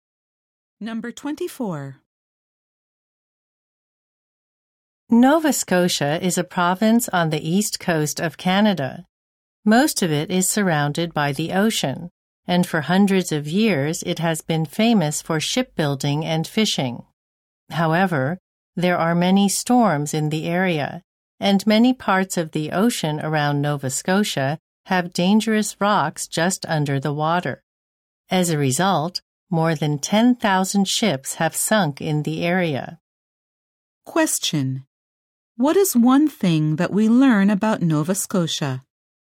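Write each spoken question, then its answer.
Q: What is one thing that we learn about Nova Scotia?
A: More than 10,000 ships have sunk there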